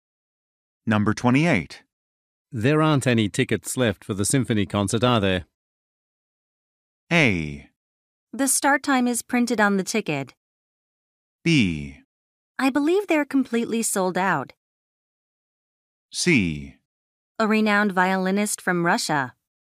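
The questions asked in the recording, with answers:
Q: There aren't any tickets left for the symphony concert, are there?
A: B: I believe they're completely sold out.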